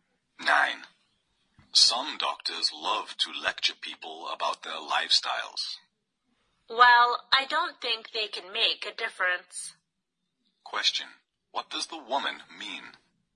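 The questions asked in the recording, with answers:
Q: What does the woman mean?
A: Doctors' lectures on lifestyle don't change people's habits.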